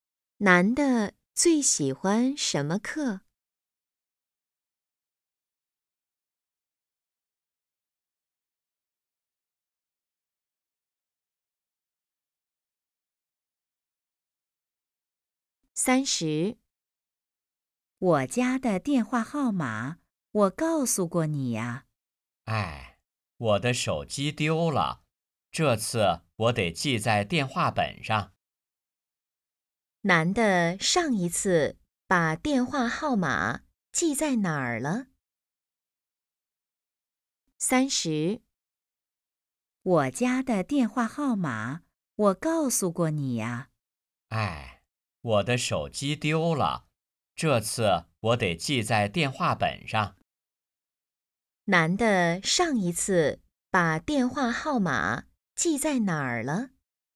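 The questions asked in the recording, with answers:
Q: 男的上一次把电话号码记在哪儿了?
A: 手机上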